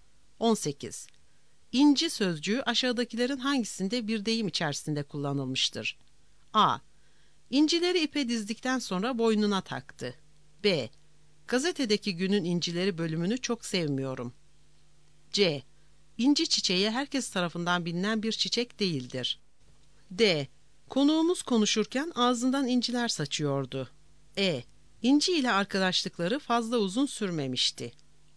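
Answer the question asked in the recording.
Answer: D: Konuğumuz konuşurken ağzından inciler saçıyordu.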